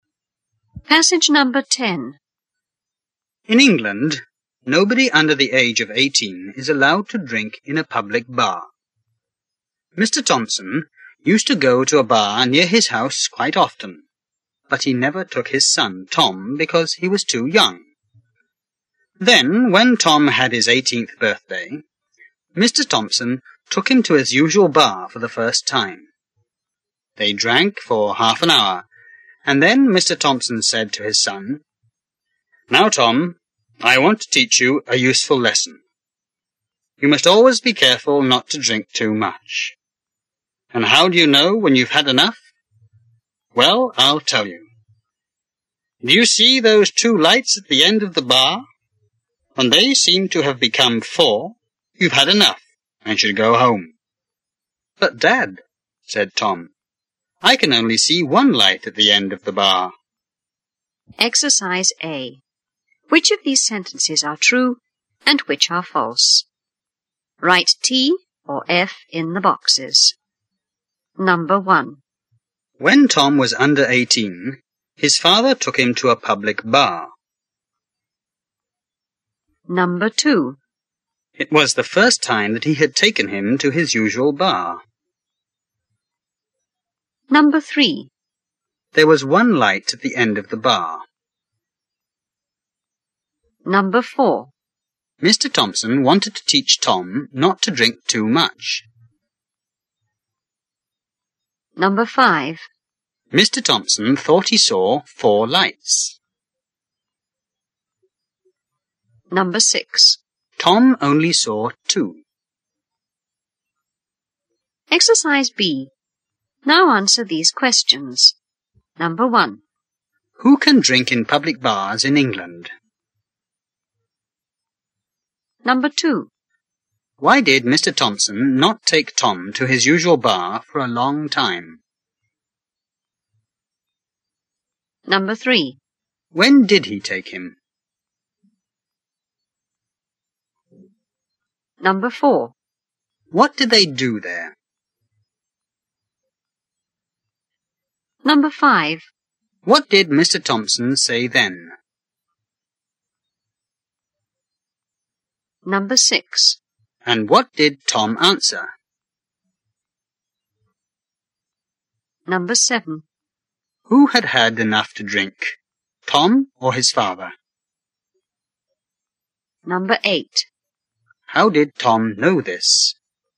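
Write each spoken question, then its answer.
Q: Who can drink in public bars in England?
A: People aged 18 or over

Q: Why did Mr. Thompson not take Tom to his usual bar for a long time?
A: Because Tom was too young

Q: When did he take him?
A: When Tom had his 18th birthday

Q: What did they do there?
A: They drank for half an hour

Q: What did Mr. Thompson say then?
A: That Tom must be careful not to drink too much, and when the two lights at the end of the bar seem to be four, he has had enough

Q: And what did Tom answer?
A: That he could only see one light at the end of the bar

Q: Who had had enough to drink, Tom or his father?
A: His father

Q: How did Tom know this?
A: There was only one light, but his father saw two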